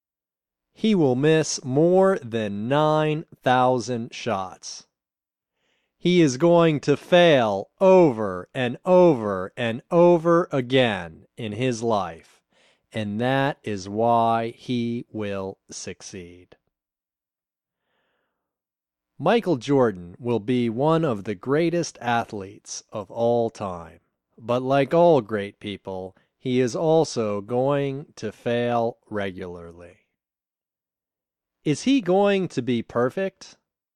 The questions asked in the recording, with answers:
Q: Is he going to be perfect?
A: No, he isn't going to be perfect.